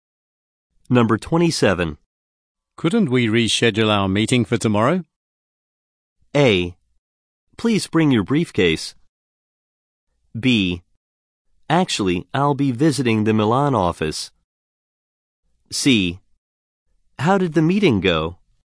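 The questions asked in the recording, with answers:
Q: Couldn't we reschedule our meeting for tomorrow?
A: B: Actually, I'll be visiting the Milan office.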